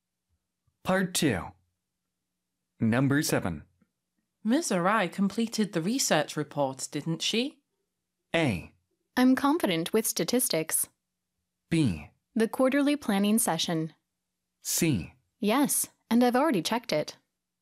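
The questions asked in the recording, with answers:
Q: Ms. Arai completed the research report, didn't she?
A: C: Yes, and I've already checked it.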